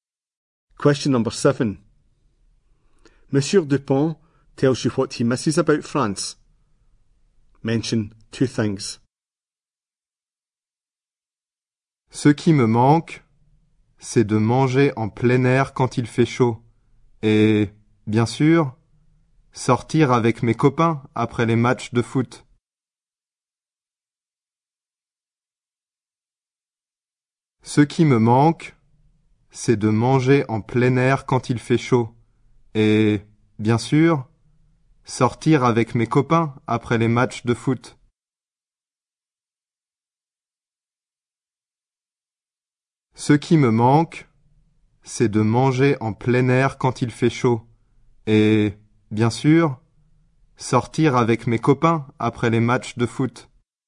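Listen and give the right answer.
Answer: Eating outdoors when it's hot; going out with friends after football matches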